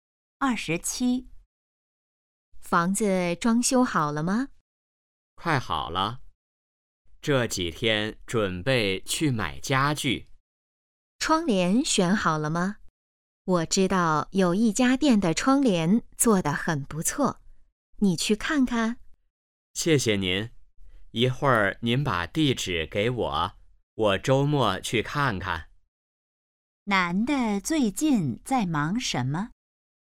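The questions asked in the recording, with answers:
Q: 男的最近在忙什么?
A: 装修房子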